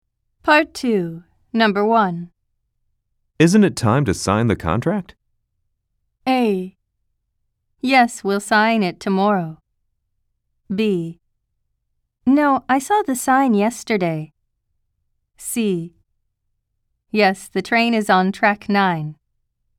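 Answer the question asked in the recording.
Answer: A: Yes, we'll sign it tomorrow.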